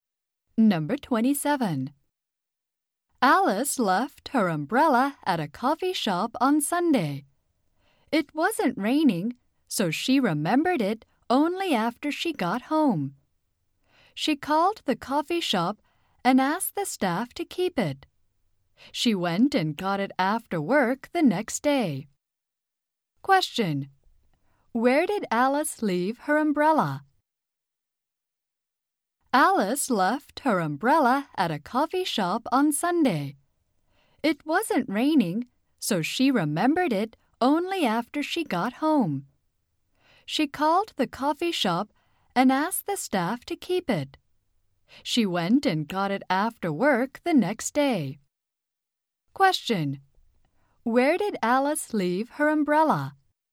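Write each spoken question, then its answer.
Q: Where did Alice leave her umbrella?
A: At a coffee shop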